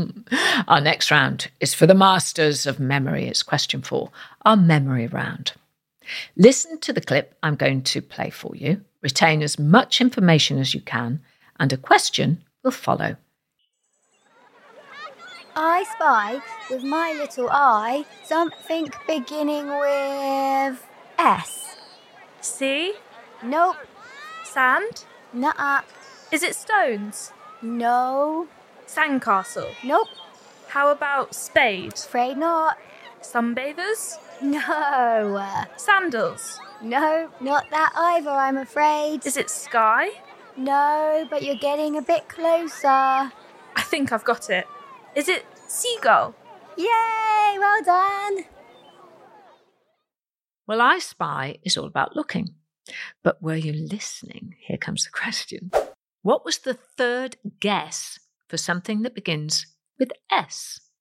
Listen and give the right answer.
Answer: the one I was looking for was stones.